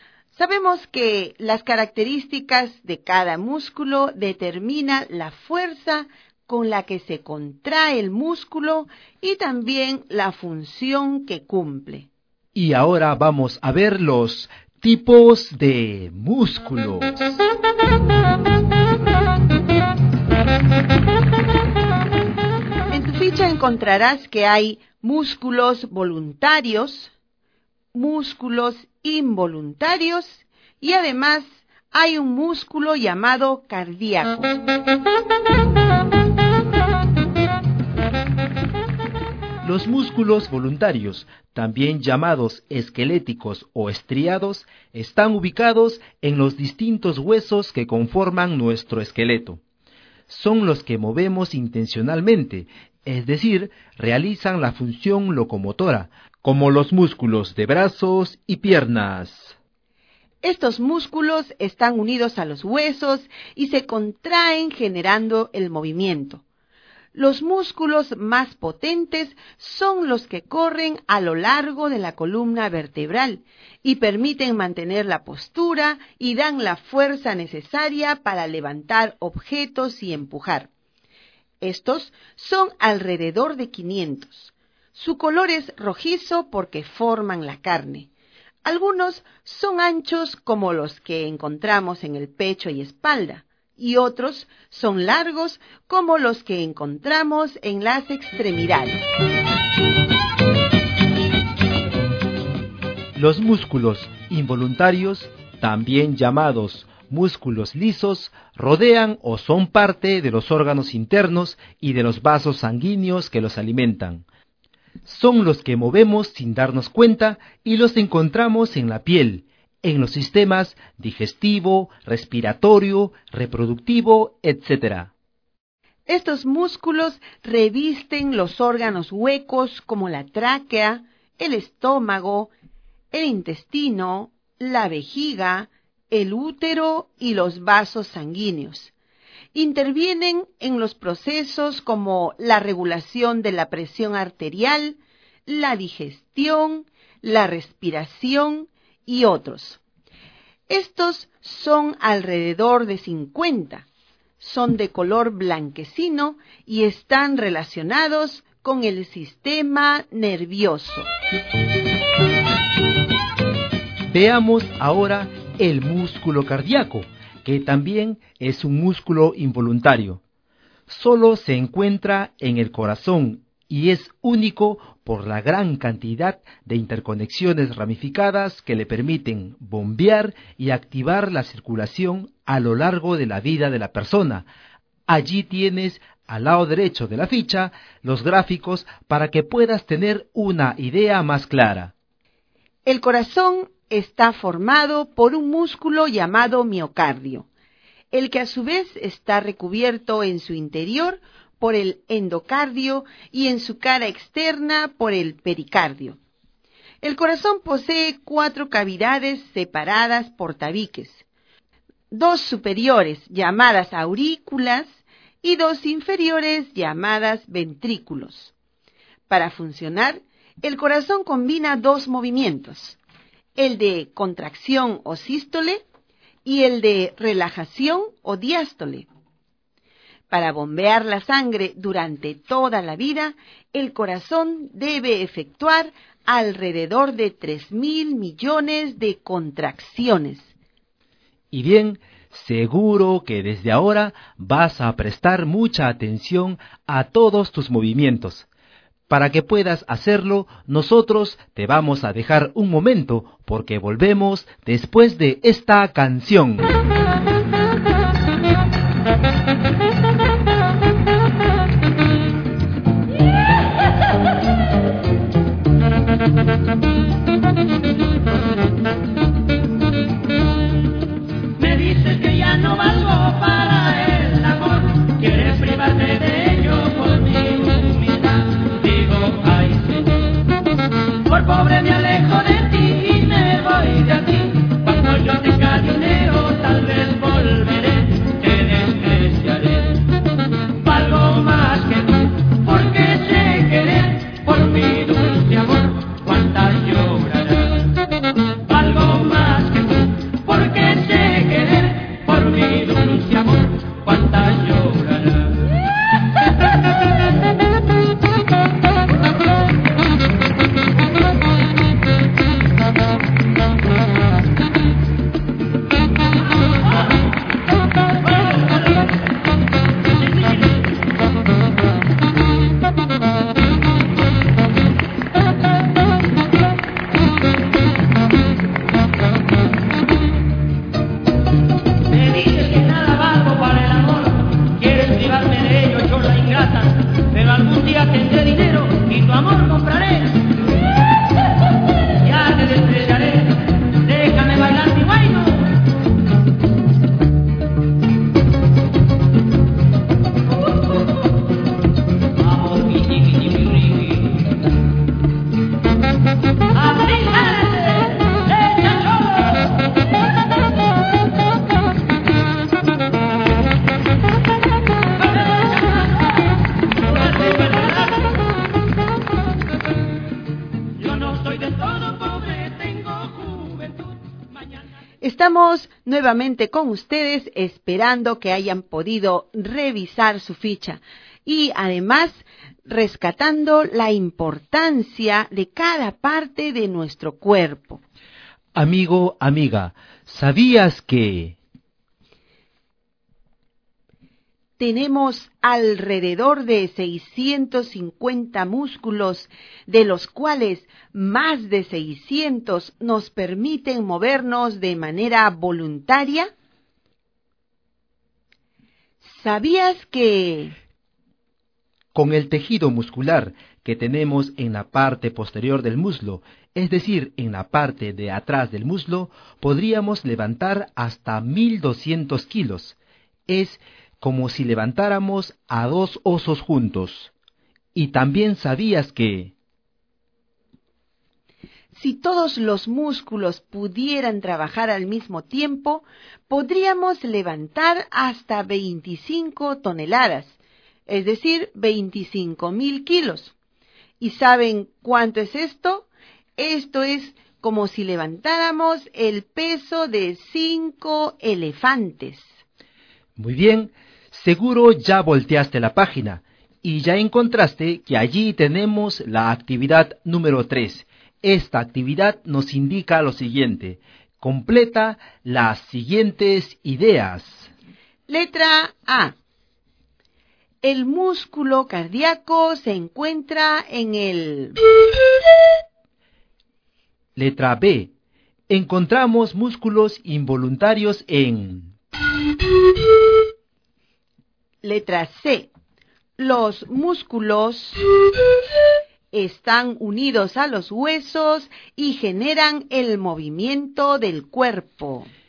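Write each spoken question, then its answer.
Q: Letra A. El músculo cardíaco se encuentra en el...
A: corazón

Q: Letra B. Encontramos músculos involuntarios en...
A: los órganos internos (piel, sistema digestivo, respiratorio, vasos sanguíneos)

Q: Letra C. Los músculos... están unidos a los huesos y generan el movimiento del cuerpo.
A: voluntarios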